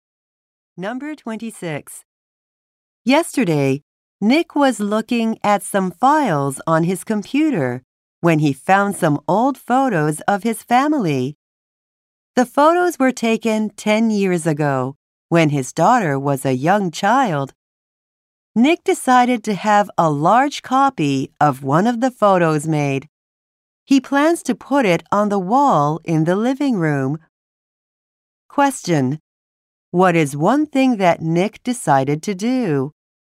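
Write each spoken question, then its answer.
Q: What is one thing that Nick decided to do?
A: Have a large copy of an old family photo made.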